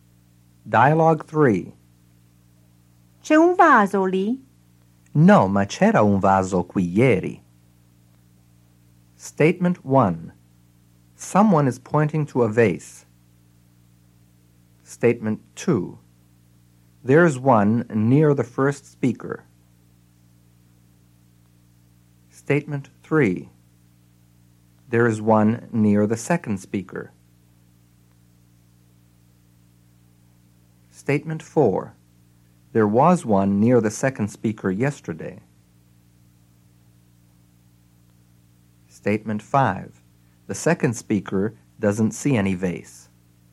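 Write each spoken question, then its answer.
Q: Someone is pointing to a vase.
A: False

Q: There is one near the second speaker.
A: False

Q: There was one near the second speaker yesterday.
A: True

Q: The second speaker doesn't see any vase.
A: True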